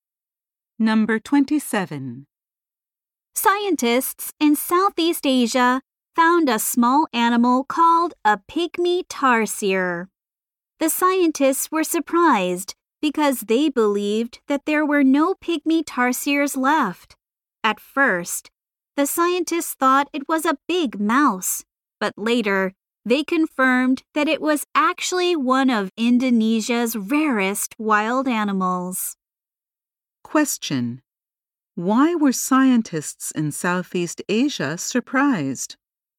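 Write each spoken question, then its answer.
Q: Why were scientists in Southeast Asia surprised?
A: They believed there were no pygmy tarsiers left.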